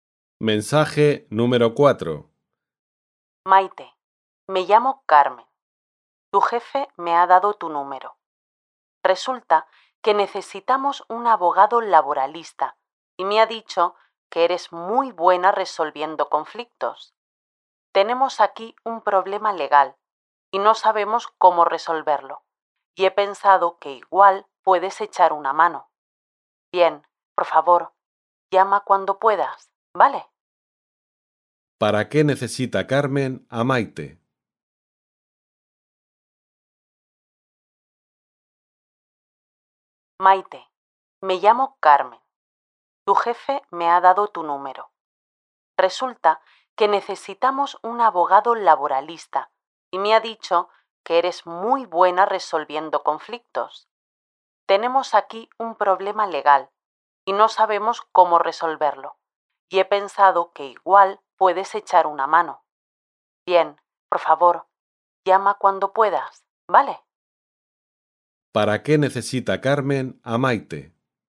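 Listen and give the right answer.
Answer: Para que les ayude a resolver un problema legal como abogada laboralista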